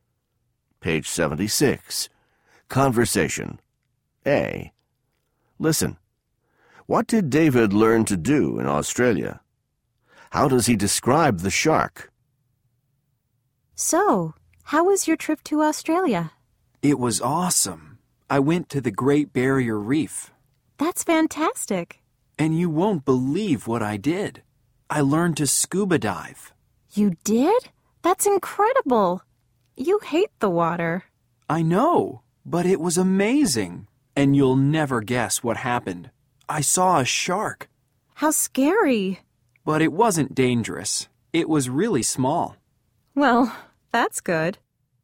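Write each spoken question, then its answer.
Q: What did David learn to do in Australia?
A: He learned to scuba dive.

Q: How does he describe the shark?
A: It wasn't dangerous; it was really small.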